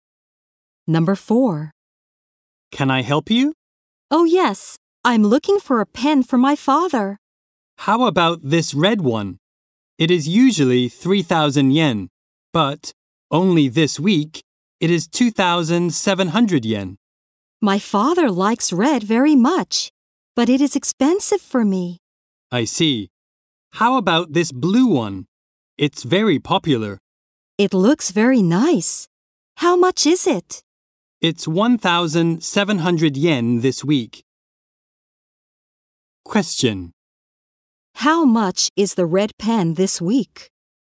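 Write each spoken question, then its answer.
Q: How much is the red pen this week?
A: 2,700 yen.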